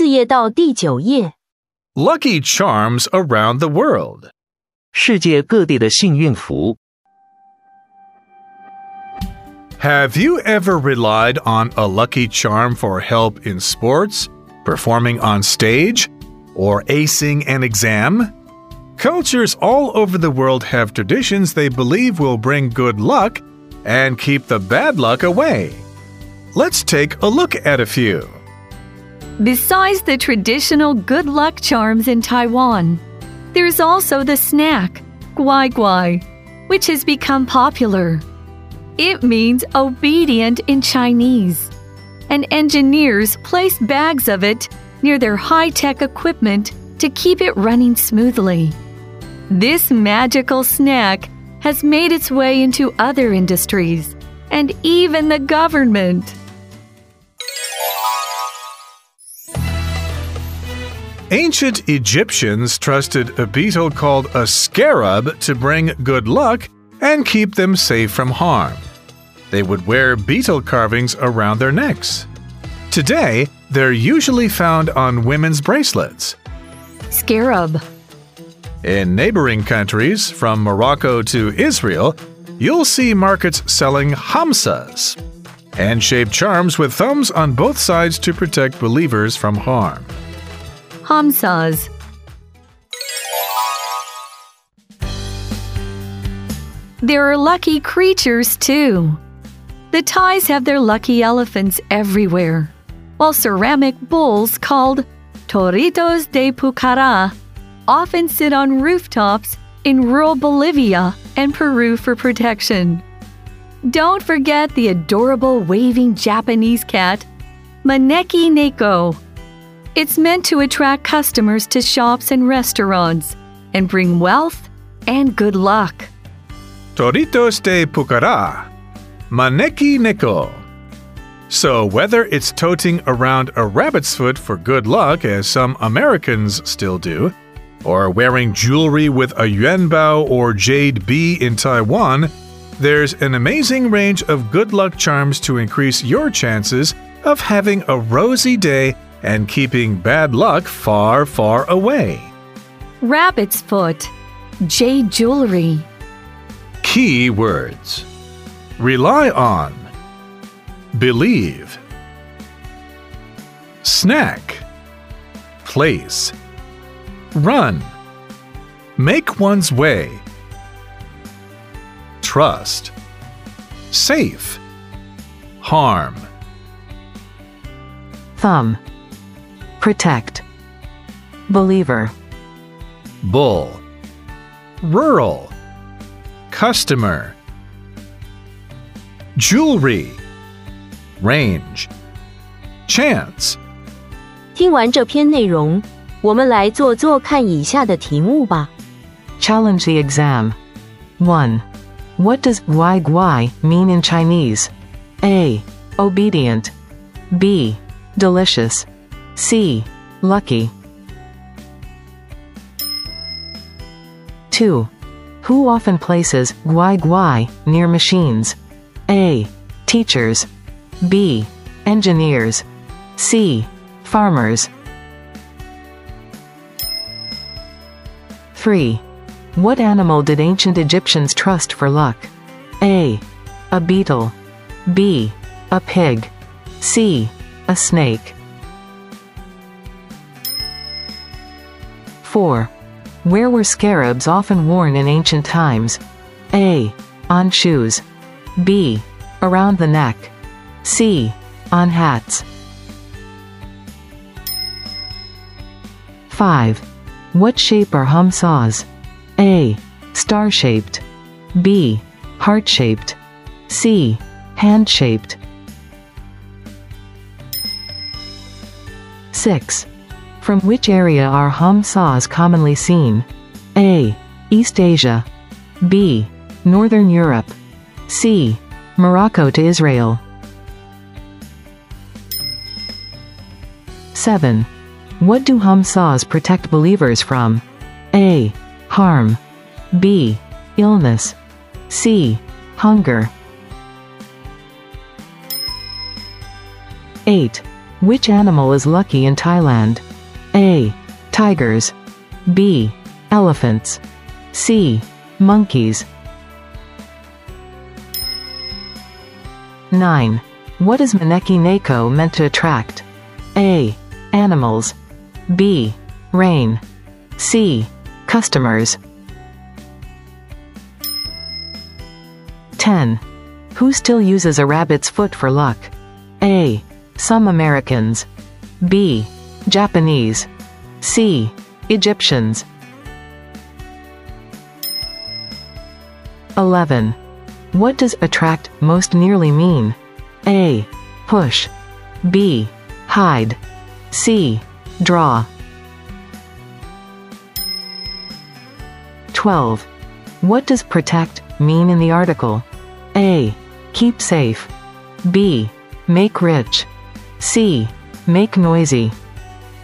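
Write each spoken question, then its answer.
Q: What does guai guai mean in Chinese?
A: A: Obedient.

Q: Who often places guai guai near machines?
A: B: Engineers.

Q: What animal did ancient Egyptians trust for luck?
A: A: A beetle.

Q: Where were scarabs often worn in ancient times?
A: B: Around the neck.

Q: What shape are hamsas?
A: C: Hand-shaped.

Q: From which area are hamsas commonly seen?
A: C: Morocco to Israel.

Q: What do hamsas protect believers from?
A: A: Harm.

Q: Which animal is lucky in Thailand?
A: B: Elephants.

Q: What is Maneki Neko meant to attract?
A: C: Customers.

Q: Who still uses a rabbit's foot for luck?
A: A: Some Americans.

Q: What does attract most nearly mean?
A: C: Draw.

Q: What does protect mean in the article?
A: A: Keep safe.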